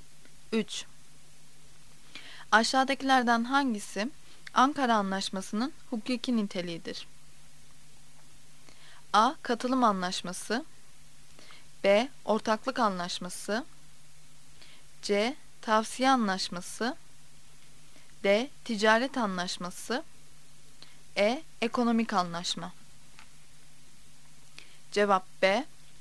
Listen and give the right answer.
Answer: Cevap B. Ortaklık Anlaşması.